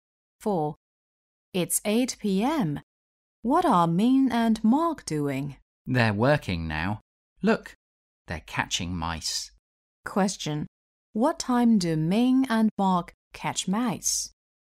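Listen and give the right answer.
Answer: 8 p.m.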